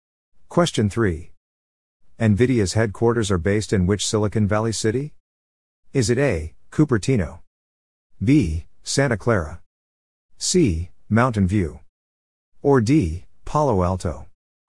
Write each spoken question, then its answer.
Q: NVIDIA's headquarters are based in which Silicon Valley city?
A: The answer is B. Santa Clara.